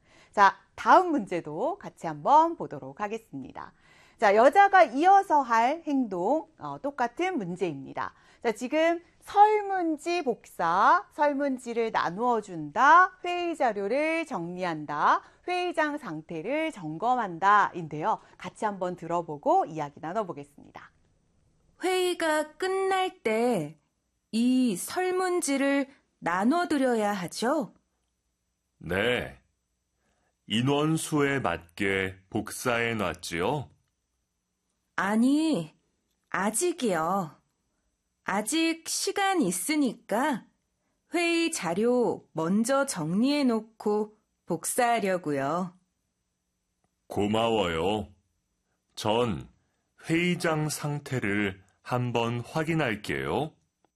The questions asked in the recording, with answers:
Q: 자, 여자가 이어서 할 행동, 똑같은 문제입니다.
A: 자, 회의 자료를 정리한다라고 하는 3번이 바로 정답이 되겠습니다.